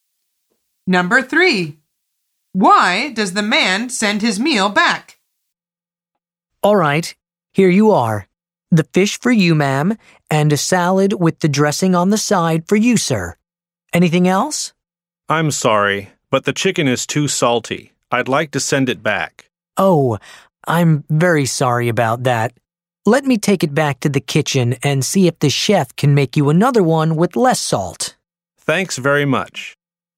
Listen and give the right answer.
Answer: The answer is it's too salty.